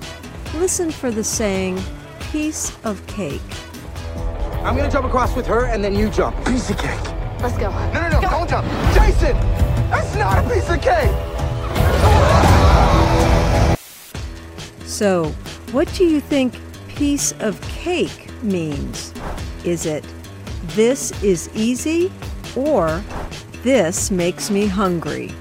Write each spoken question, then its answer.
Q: So, what do you think piece of cake means?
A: Piece of cake means this is easy.